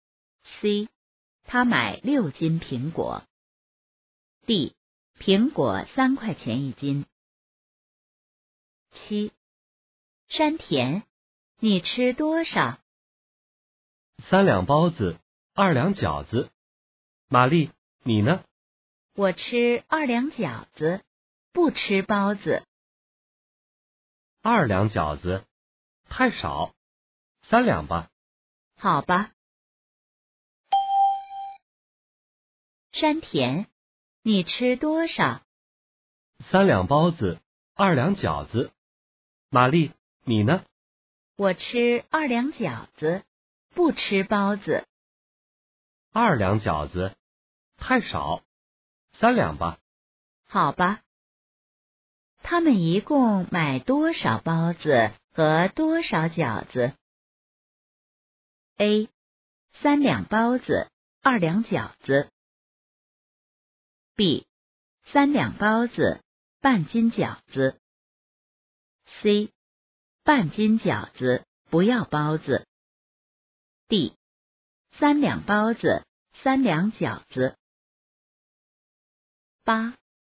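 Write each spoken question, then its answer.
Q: 他们一共买多少包子和多少饺子?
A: B: 三两包子,半斤饺子。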